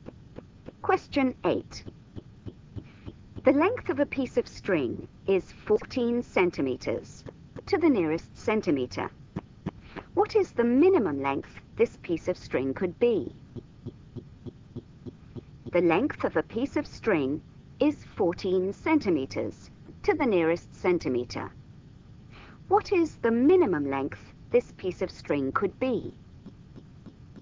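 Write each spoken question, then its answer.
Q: What is the minimum length this piece of string could be?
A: 13.5 cm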